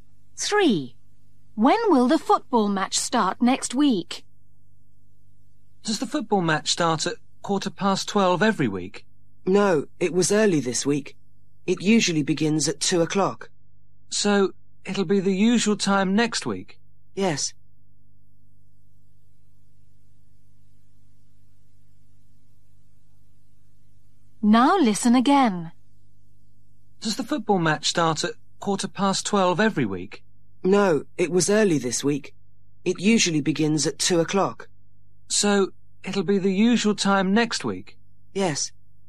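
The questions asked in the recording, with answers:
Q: When will the football match start next week?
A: At 2 o'clock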